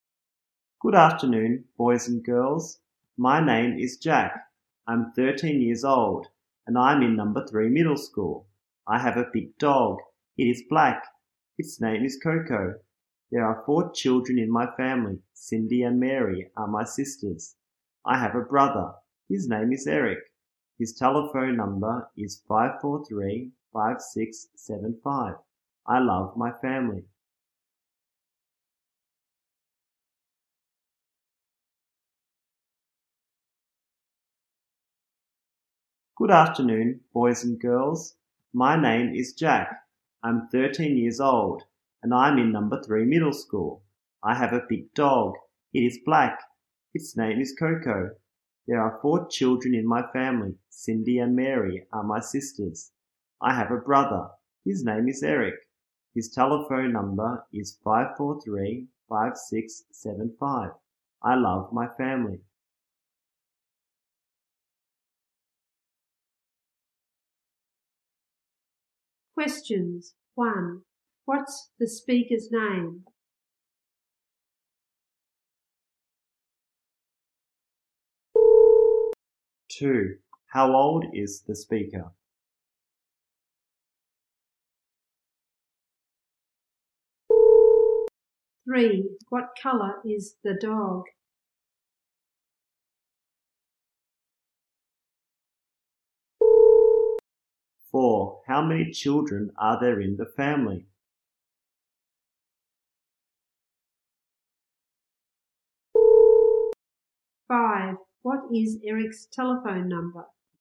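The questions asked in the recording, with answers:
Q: What's the speaker's name?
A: Jack

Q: How old is the speaker?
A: 13

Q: What color is the dog?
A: Black

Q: What is Eric's telephone number?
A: 543-5675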